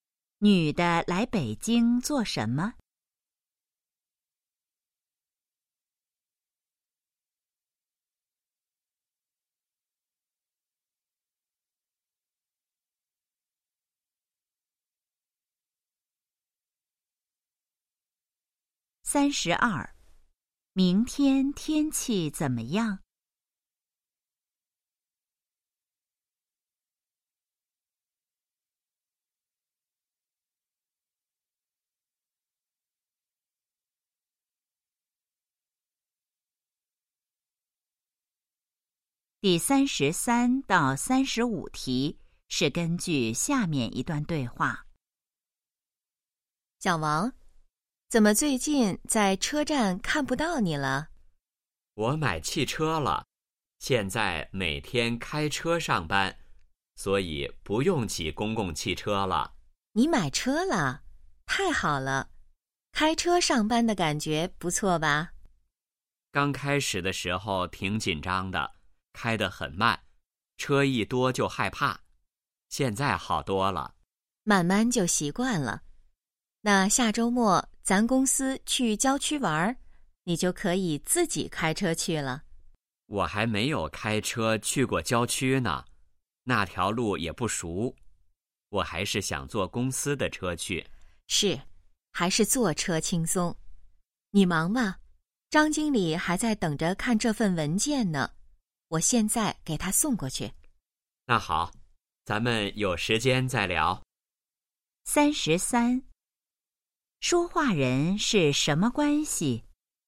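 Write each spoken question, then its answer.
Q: 说话人是什么关系?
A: 同事

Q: 男的下周末要做什么?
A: 和公司去郊区玩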